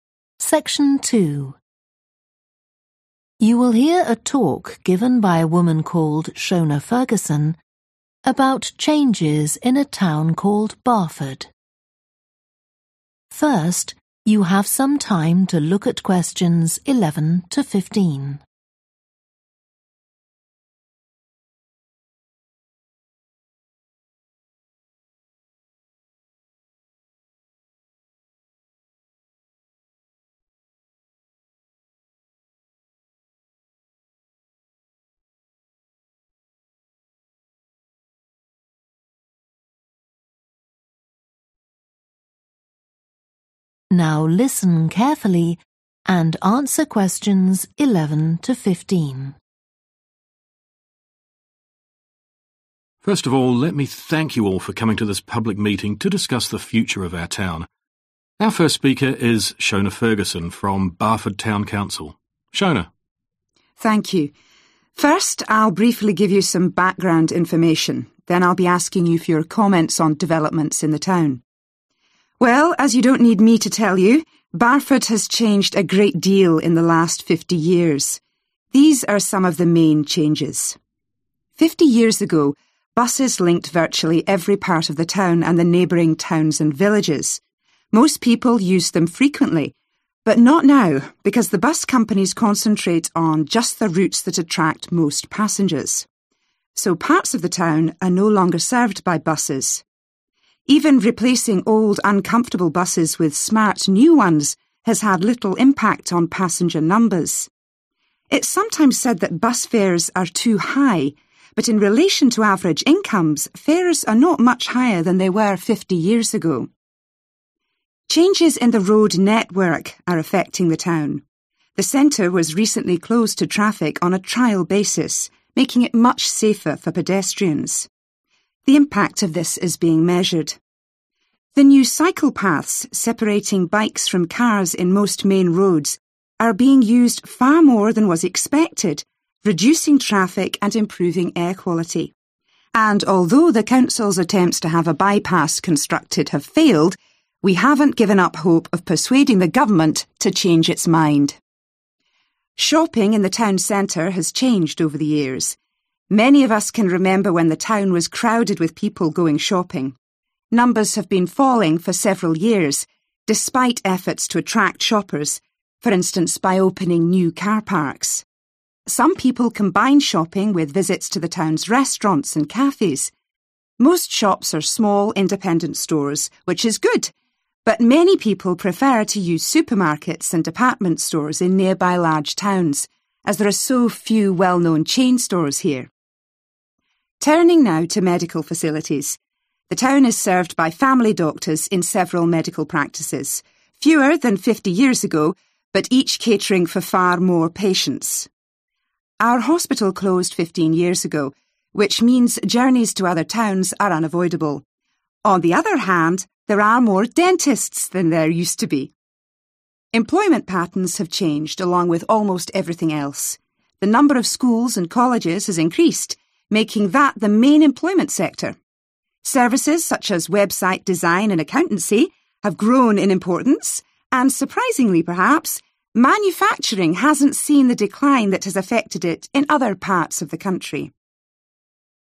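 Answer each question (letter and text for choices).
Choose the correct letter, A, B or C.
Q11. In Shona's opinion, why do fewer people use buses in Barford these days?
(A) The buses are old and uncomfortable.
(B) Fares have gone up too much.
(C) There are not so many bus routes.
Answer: (C) There are not so many bus routes.

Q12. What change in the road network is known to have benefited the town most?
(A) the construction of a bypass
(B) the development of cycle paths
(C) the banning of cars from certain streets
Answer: (B) the development of cycle paths

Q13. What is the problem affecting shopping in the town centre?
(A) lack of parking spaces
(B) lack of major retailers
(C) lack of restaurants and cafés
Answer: (B) lack of major retailers

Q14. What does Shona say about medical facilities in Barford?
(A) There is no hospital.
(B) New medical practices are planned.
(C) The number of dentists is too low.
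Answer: (A) There is no hospital.

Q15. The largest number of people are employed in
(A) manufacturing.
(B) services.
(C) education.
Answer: (C) education.

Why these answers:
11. Most people used them frequently, but not now because the bus companies concentrate on just the routes that attract most passengers. So parts of the town are no longer served by buses (Hầu hết mọi người đều đi xe buýt thường xuyên, nhưng giờ thì không, bởi các công ty xe buýt chỉ tập trung vào các tuyến thu hút nhiều hành khách nhất. Vì vậy, nhiều khu vực của thị trấn không còn được xe buýt phục vụ)
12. The new cycle paths separating bikes from cars in most main roads, are being used far more than was expected reducing traffic and improving air quality (Những tuyến đường dành cho xe đạp mới giúp tách xe đạp ra khỏi ô tô ở hầu hết các tuyến đường chính, hiện đang được sử dụng nhiều hơn mong đợi, giúp làm giảm lưu lượng và cải thiện chất lượng không khí)
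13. Most shops are small independent stores, which is good, but many people prefer to use supermarkets and department stores in nearby large towns, as there are so few well-known chain stores here (nhiều người thích siêu thị và cửa hàng bách hóa ở các thị trấn lớn gần đó, sở dĩ là bởi có quá ít chuỗi cửa hàng nổi tiếng ở đây)
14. Our hospital closed 15 years ago (Bệnh viện của chúng tôi đã đóng cửa 15 năm trước), which means journeys to other towns are unavoidable.
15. The number of schools and colleges has increased making that the main employment sector (Số lượng các trường học và cao đẳng đã tăng lên, trở thành lĩnh vực việc làm chính)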